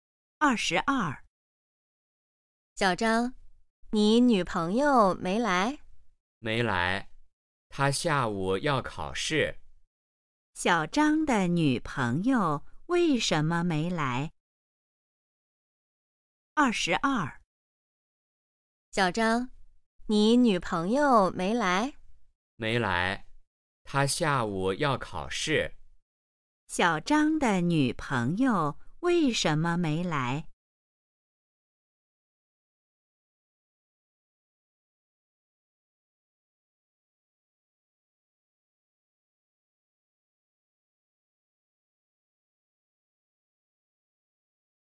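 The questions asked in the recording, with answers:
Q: 小张的女朋友为什么没来?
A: 她下午要考试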